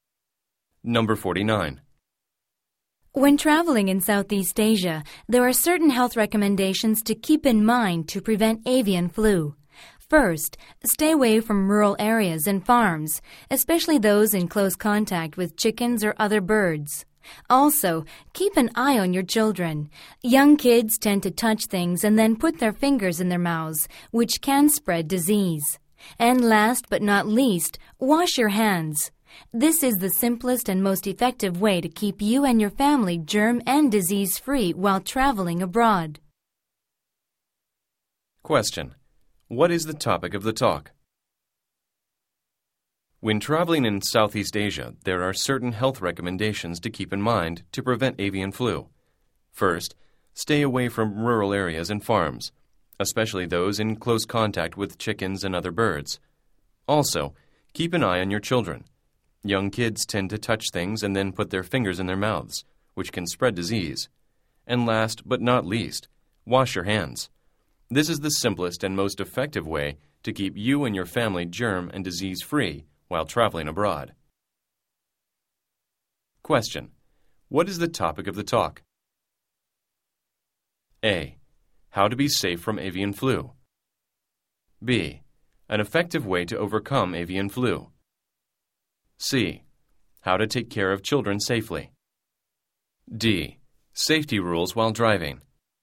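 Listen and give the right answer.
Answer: A: How to be safe from avian flu.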